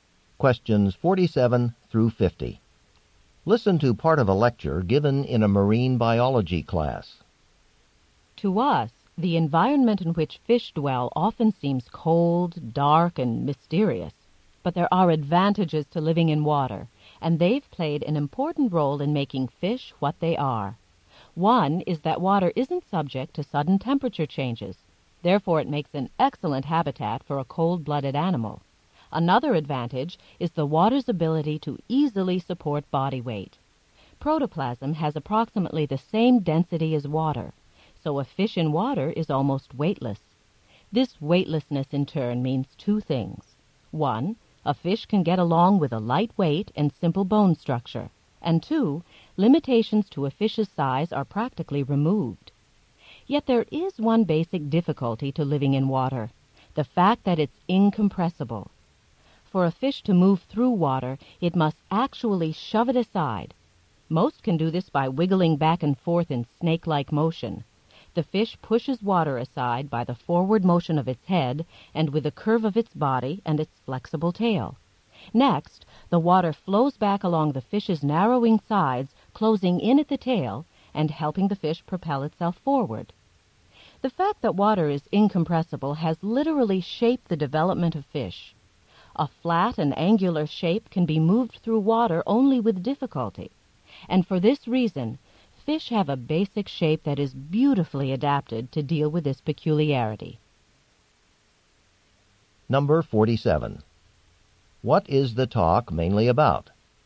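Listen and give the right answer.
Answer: How fish are adapted to living in water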